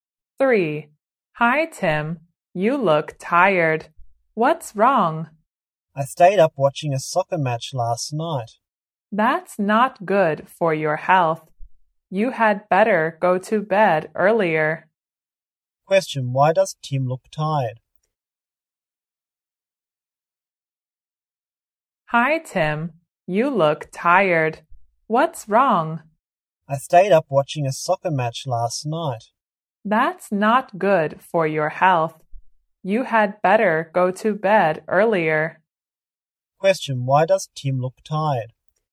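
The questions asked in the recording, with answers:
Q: why does Tim look tired?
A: He stayed up watching a soccer match last night.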